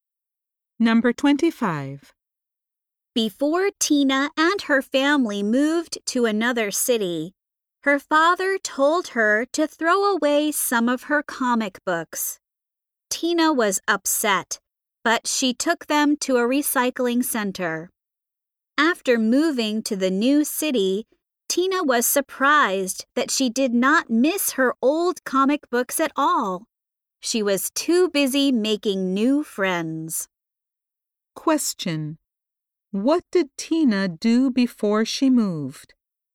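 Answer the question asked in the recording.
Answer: She took some comic books to a recycling center.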